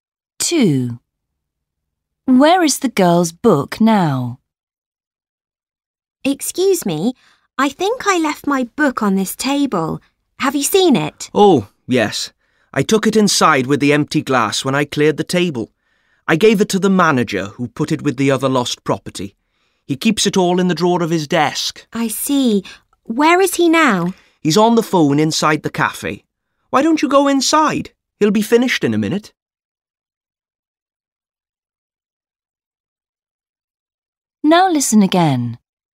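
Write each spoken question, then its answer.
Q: Where is the girl's book now?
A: in the drawer of the manager's desk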